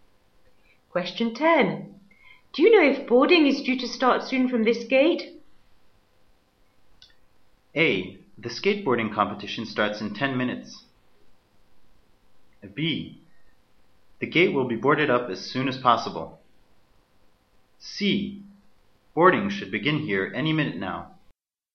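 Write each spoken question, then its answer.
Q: Do you know if boarding is due to start soon from this gate?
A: C: Boarding should begin here any minute now.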